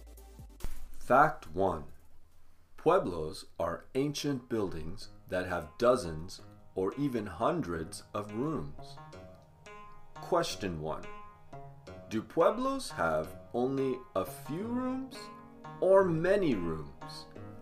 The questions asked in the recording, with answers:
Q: Do pueblos have only a few rooms or many rooms?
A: Pueblos have many, many rooms, hundreds.